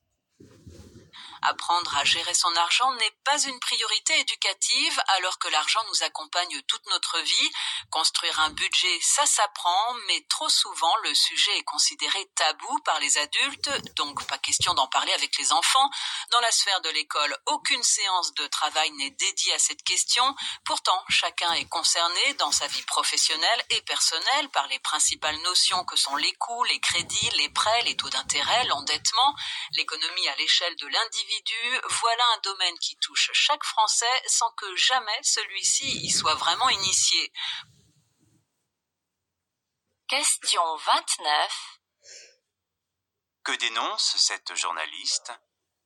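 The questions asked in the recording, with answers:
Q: Que dénonce cette journaliste ?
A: L'absence d'éducation à la gestion de l'argent, notamment à l'école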